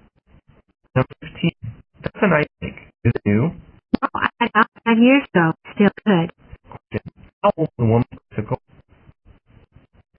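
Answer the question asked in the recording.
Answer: About 5 years old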